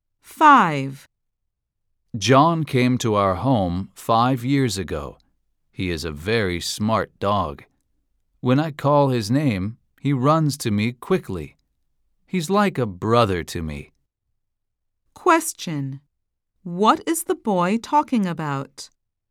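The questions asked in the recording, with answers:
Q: What is the boy talking about?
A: His dog, John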